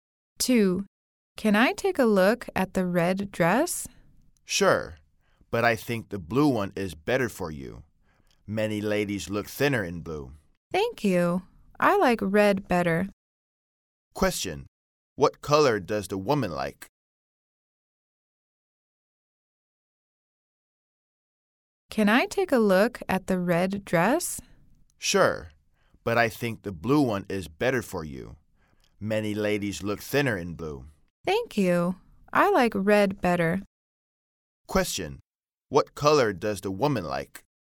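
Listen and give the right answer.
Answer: Red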